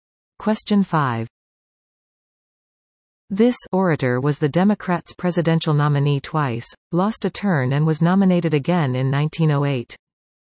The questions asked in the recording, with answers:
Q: this orator was the Democrats' presidential nominee twice, lost a turn and was nominated again in 1908.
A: The answer is William Jennings Bryan.